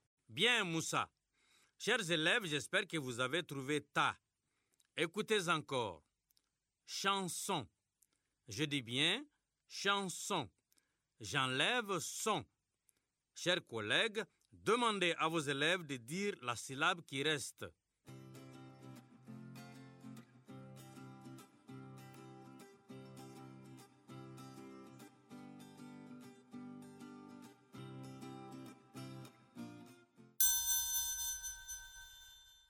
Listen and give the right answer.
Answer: Il reste chant.